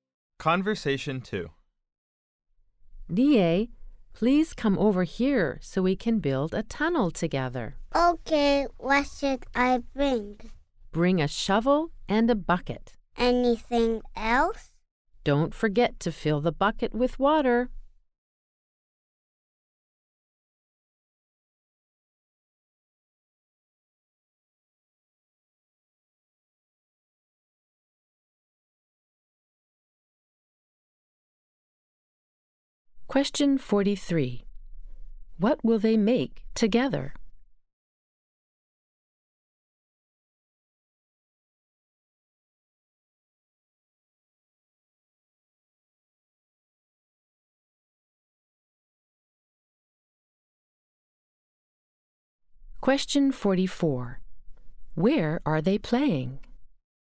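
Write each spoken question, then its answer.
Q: What will they make together?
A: A tunnel.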